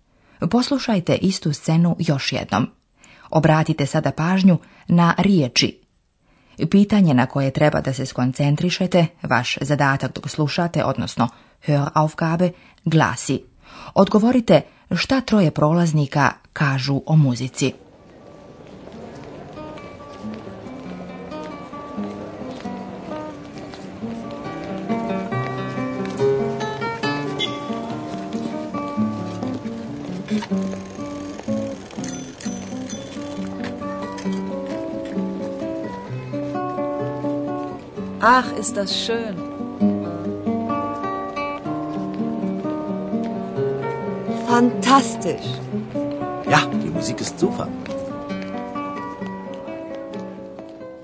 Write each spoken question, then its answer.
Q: Odgovorite šta troje prolaznika kažu o muzici.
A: Oni su oduševljeni muzikom.